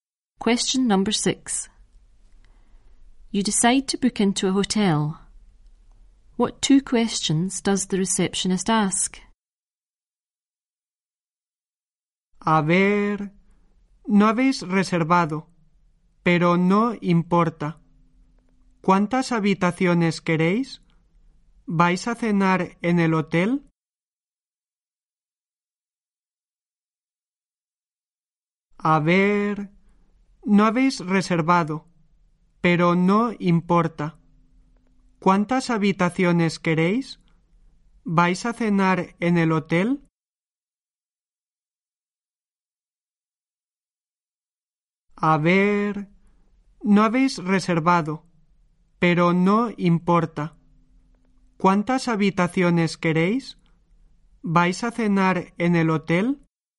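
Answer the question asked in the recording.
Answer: How many rooms do you want? Are you going to have dinner in the hotel?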